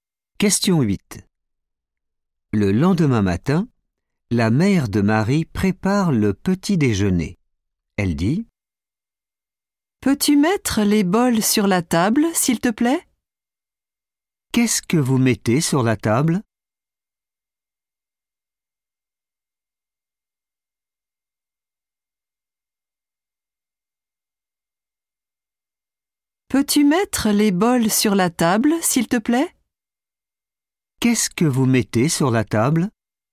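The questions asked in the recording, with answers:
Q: Qu'est-ce que vous mettez sur la table ?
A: les bols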